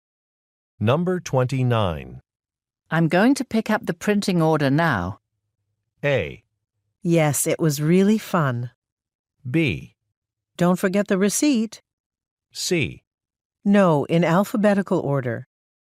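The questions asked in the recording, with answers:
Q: I'm going to pick up the printing order now.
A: B: Don't forget the receipt.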